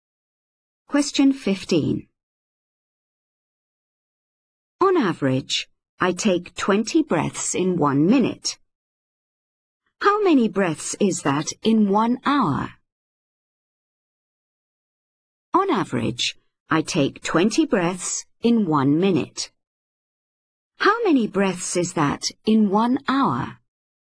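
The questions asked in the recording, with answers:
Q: How many breaths is that in 1 hour?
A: 1200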